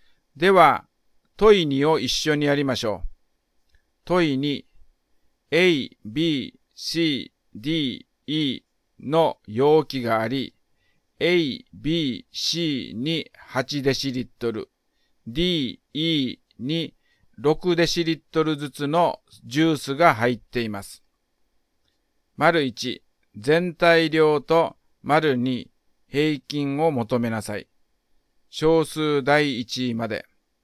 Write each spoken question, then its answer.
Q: 丸1、全体量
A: 全体量が36デシリットルです。

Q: 丸2、平均を求めなさい。小数第1位まで。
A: 5つの容器の平均は 7.2 デシリットルになりましたね。